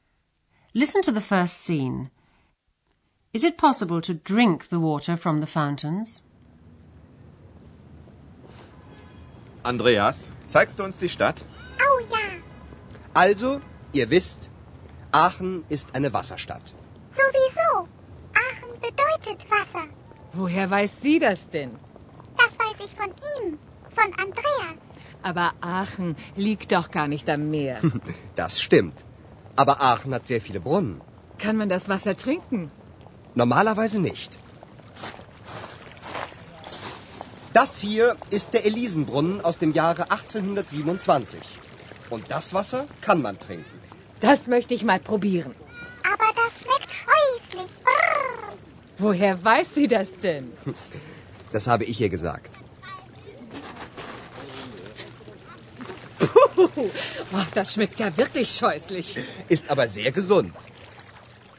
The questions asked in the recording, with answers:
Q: Is it possible to drink the water from the fountains?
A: Normally, you can't drink the water from the fountains.